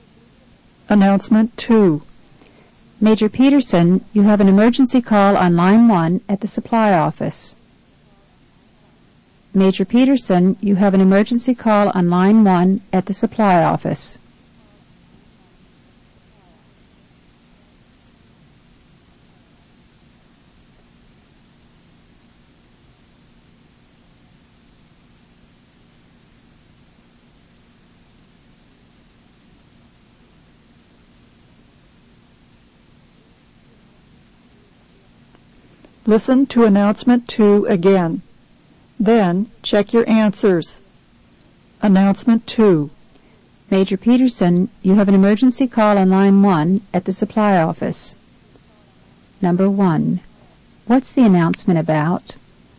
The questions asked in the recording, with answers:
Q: What's the announcement about?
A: The answer is letter C, a phone call.